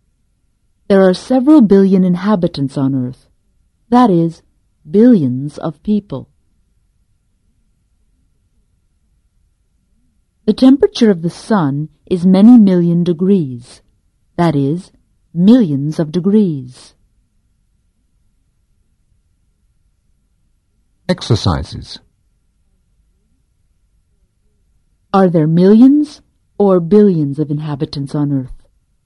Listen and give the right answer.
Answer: There are billions of inhabitants on Earth.